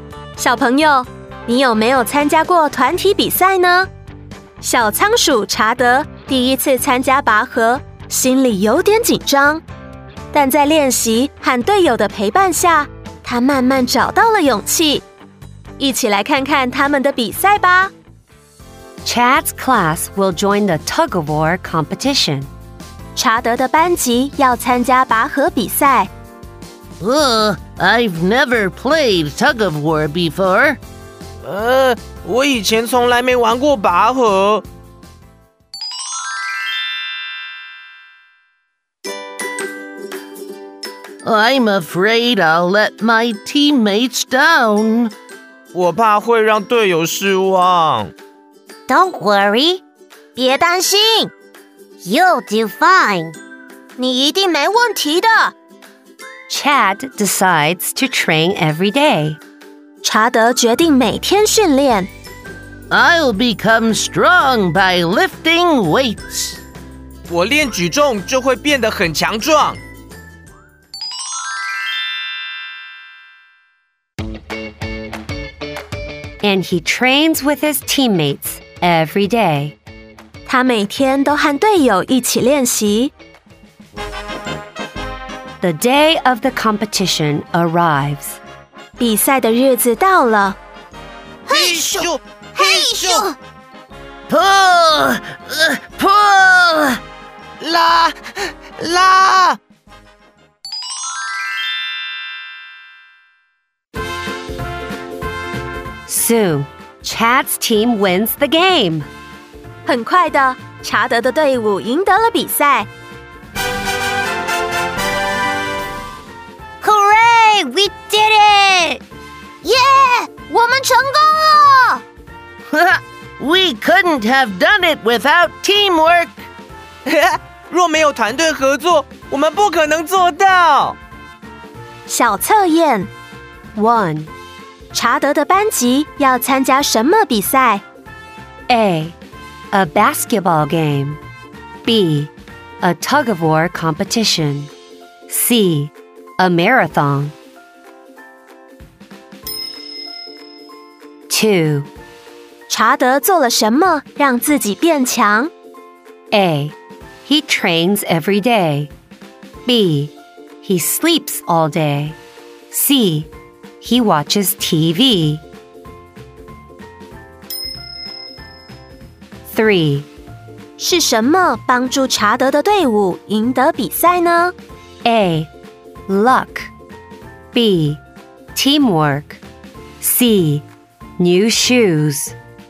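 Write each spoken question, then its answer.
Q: 查德的班级要参加什么比赛?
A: B: A tug of war competition.

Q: 查德做了什么让自己变强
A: A: He trains every day.

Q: 是什么帮助查德的队伍赢得比赛呢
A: B: Teamwork.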